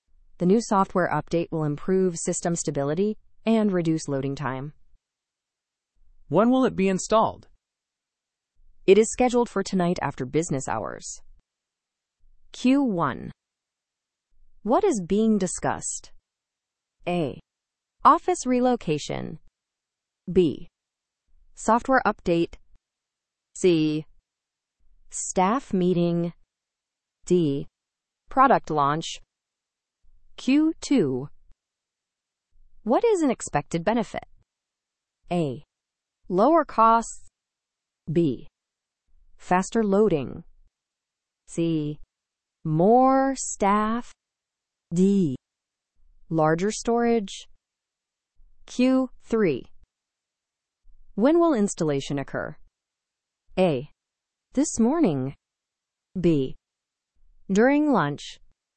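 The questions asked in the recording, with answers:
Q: What is being discussed?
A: B: Software update.

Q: What is an expected benefit?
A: B: Faster loading.

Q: When will installation occur?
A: C: Tonight.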